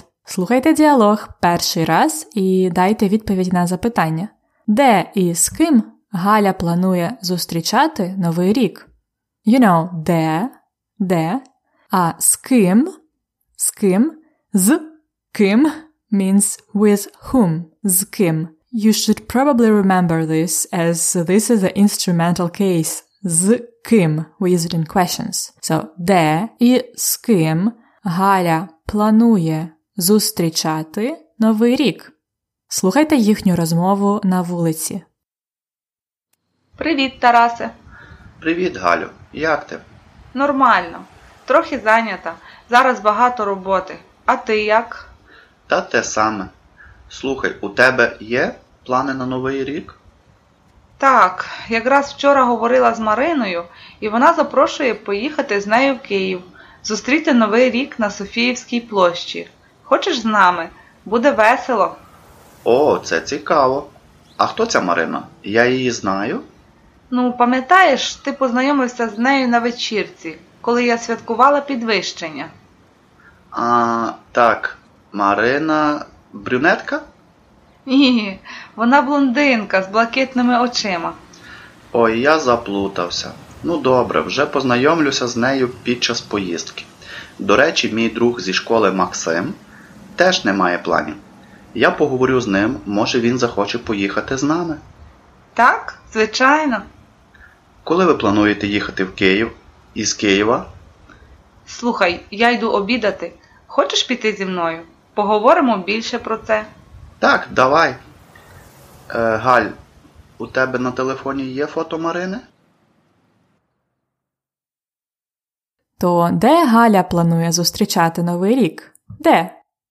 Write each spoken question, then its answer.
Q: Де і з ким Галя планує зустрічати новий рік.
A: Вона планує зустрічати новий рік у Києві на Софіївській площі.